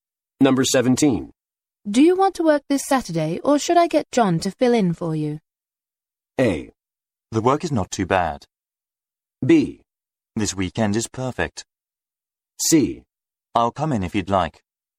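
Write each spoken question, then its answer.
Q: Do you want to work this Saturday, or should I get John to fill in for you?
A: C: I'll come in if you'd like.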